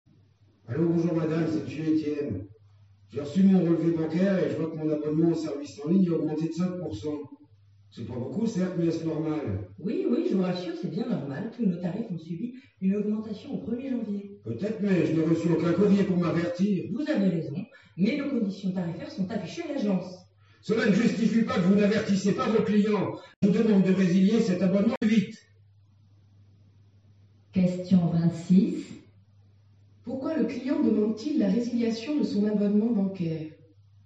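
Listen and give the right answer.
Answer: Parce que son abonnement a augmenté de 5% sans qu'il ait été averti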